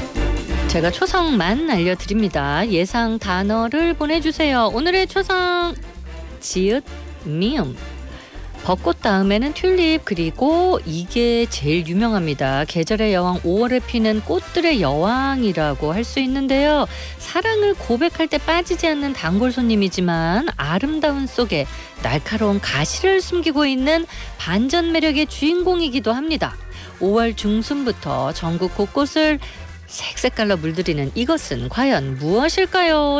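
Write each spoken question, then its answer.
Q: 5월 중순부터 전국 곳곳을 색색깔로 물들이는 이것은 과연 무엇일까요?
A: 장미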